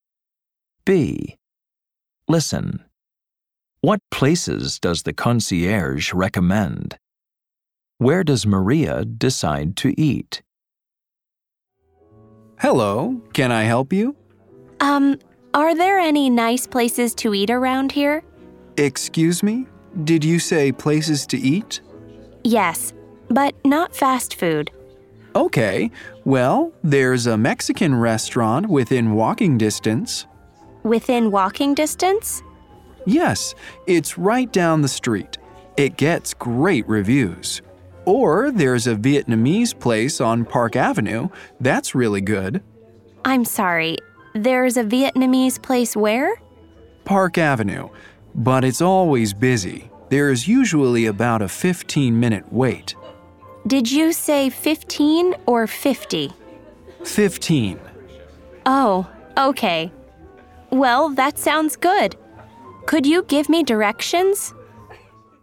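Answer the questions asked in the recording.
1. A Mexican restaurant within walking distance and a Vietnamese place on Park Avenue
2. The Vietnamese place on Park Avenue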